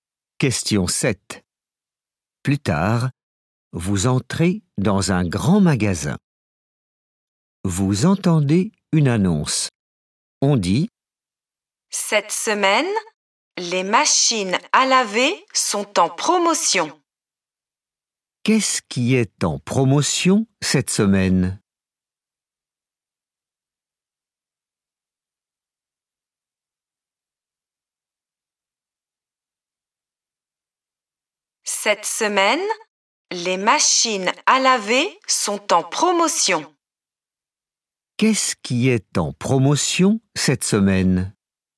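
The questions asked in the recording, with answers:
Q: Qu'est-ce qui est en promotion cette semaine?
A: les machines à laver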